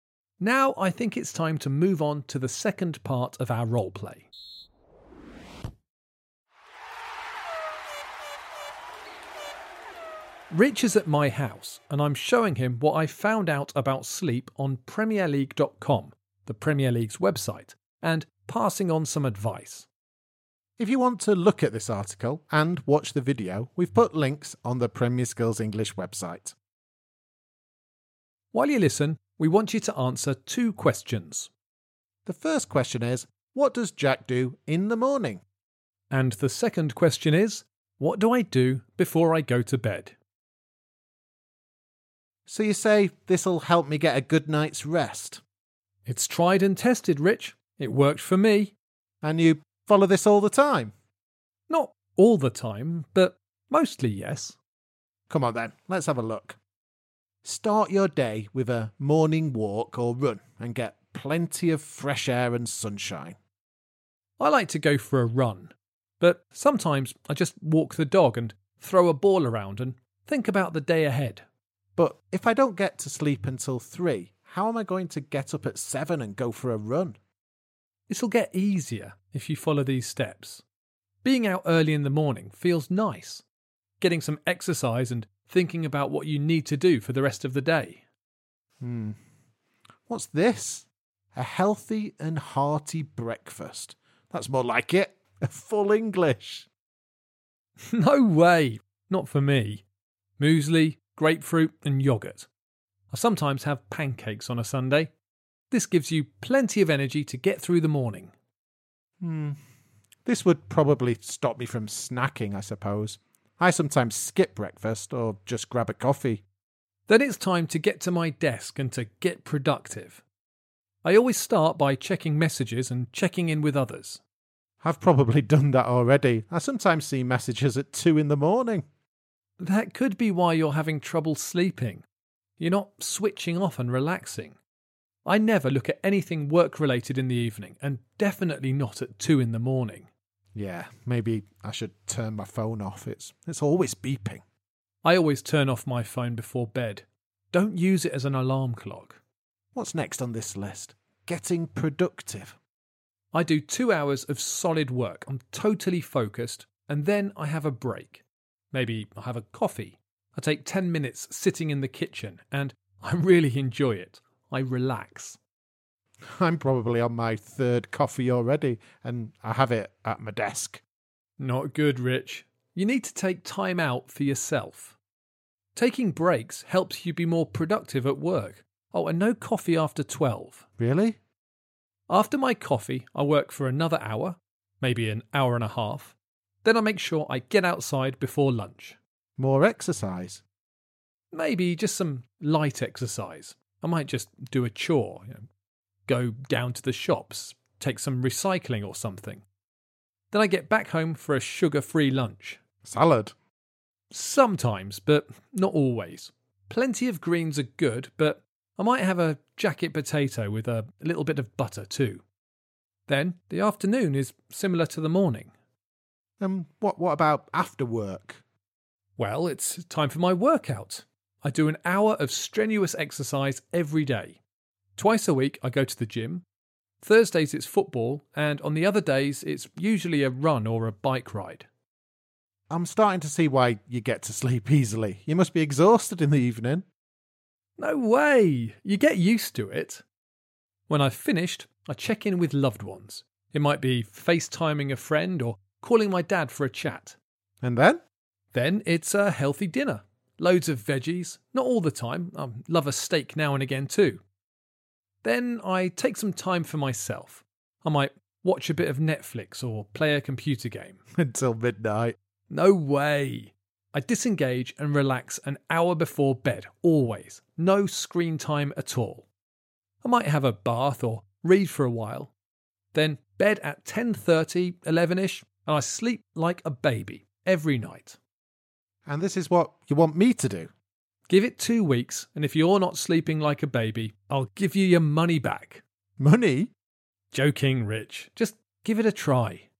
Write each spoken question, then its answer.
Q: what does Jack do in the morning?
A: Well, I suppose the key things are that I get up early and go outside and do some exercise, and that I have a healthy breakfast.

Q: what do I do before I go to bed?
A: I think the most important thing I do is relax and keep away from screens for an hour before I go to sleep.